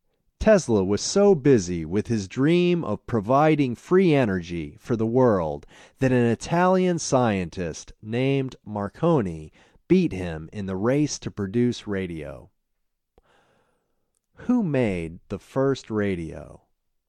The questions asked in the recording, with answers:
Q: Who made the first radio?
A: Marconi made the first radio.